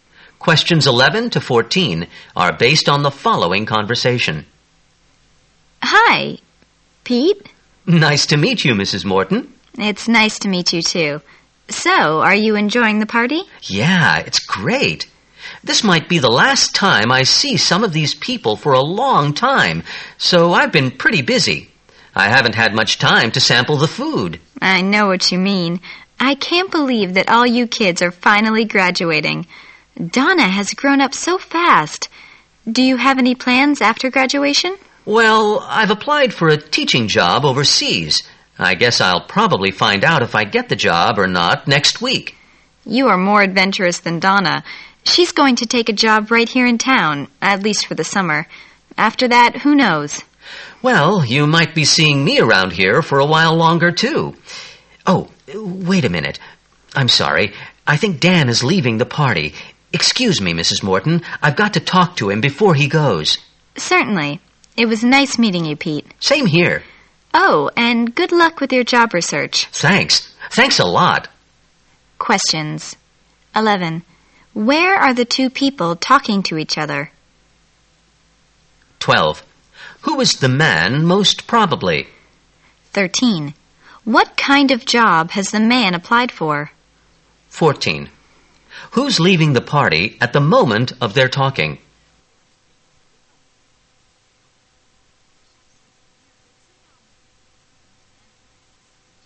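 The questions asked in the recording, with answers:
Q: Where are the two people talking to each other?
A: At a graduation party

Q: What kind of job has the man applied for?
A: A teaching job overseas

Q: Who's leaving the party at the moment of their talking?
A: Dan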